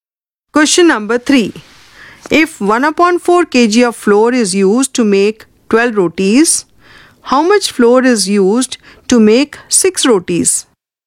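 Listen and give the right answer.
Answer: 1/8 kg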